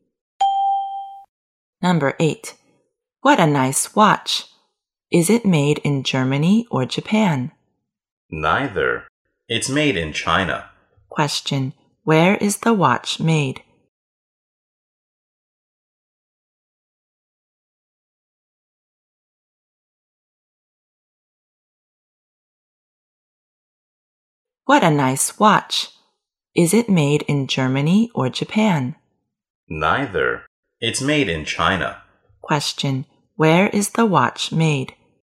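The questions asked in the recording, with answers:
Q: Where is the watch made?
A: In China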